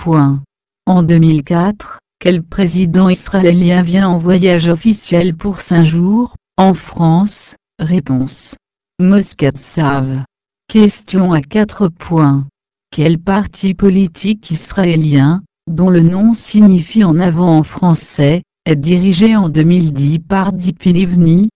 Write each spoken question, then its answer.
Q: Quel parti politique israélien, dont le nom signifie en avant en français, est dirigé en 2010 par Tzipi Livni?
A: Kadima